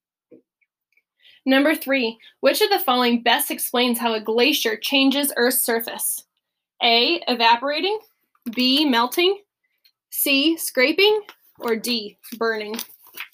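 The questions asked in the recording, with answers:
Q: which of the following best explains how a glacier changes Earth's surface?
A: C: scraping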